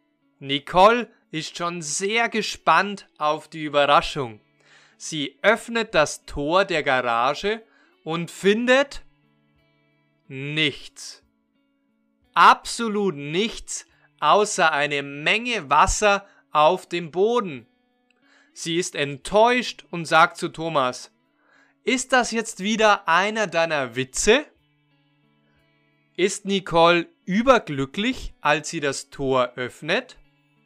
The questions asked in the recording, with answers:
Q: Ist Nicole überglücklich, als sie das Tor öffnet?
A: Nein, sie ist nicht überglücklich, sie ist enttäuscht.